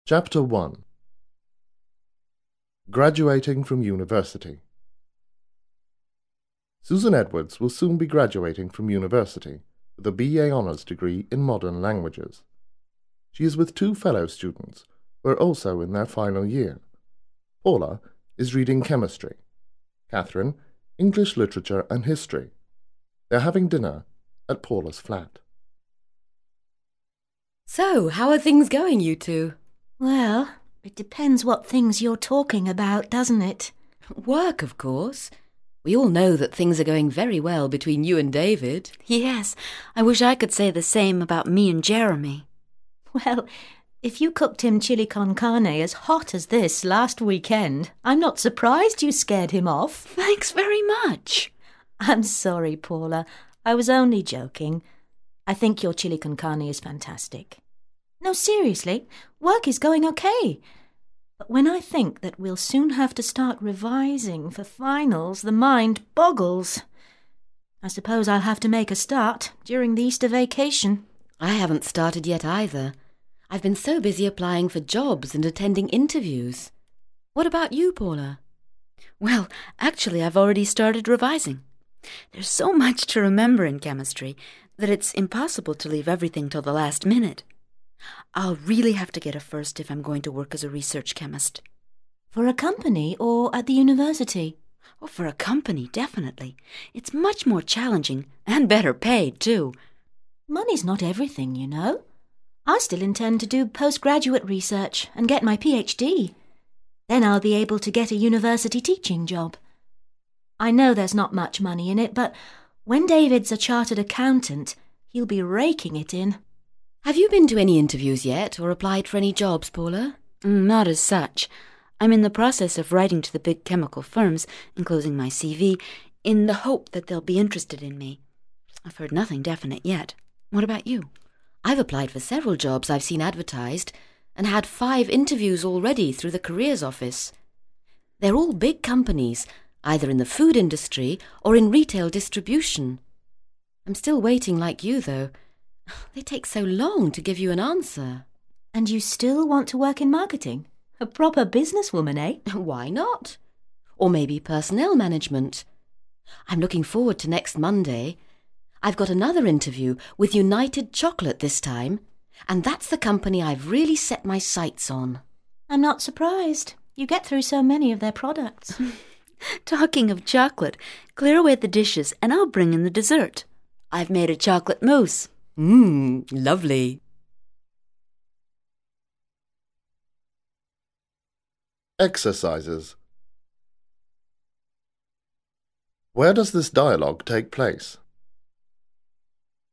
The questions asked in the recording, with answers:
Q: Where does this dialogue take place?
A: This dialogue takes place in Paula's flat.